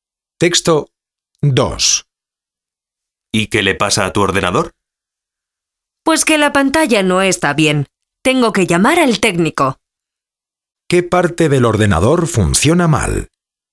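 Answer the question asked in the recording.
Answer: La pantalla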